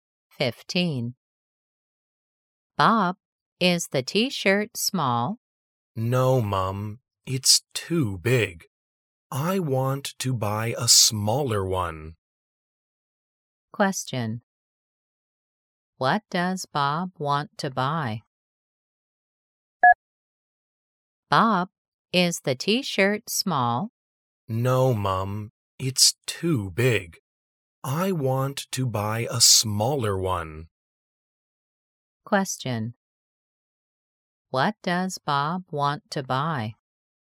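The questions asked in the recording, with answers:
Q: What does Bob want to buy?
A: A smaller T-shirt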